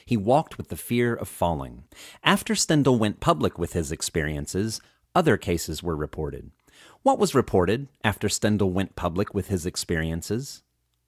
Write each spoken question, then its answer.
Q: What was reported after Stendhal went public with his experiences?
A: Other cases were reported after Stendhal went public with his experiences.